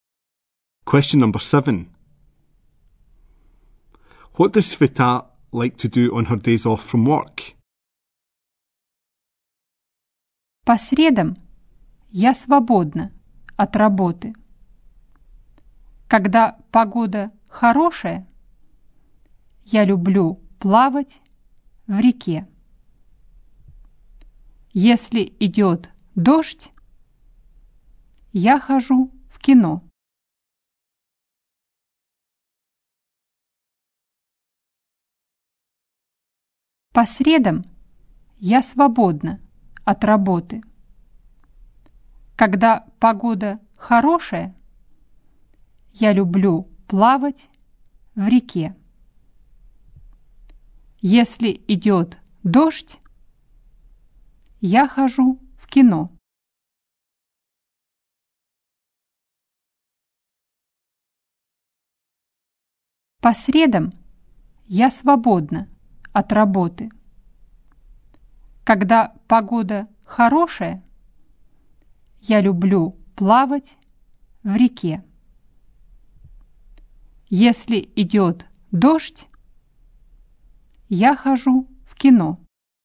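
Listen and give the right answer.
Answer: Swim in the river when the weather is good; go to the cinema if it rains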